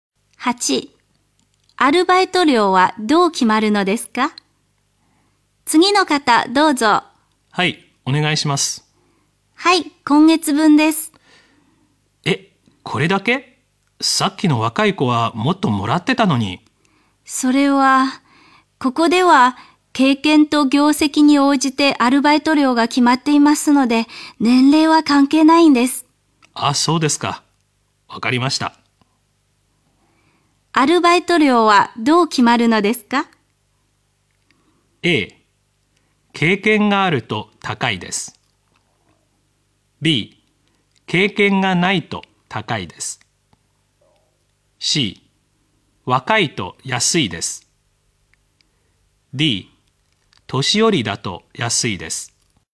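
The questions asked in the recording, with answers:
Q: アルバイト料はどう決まるのですか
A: A: 経験があると高いです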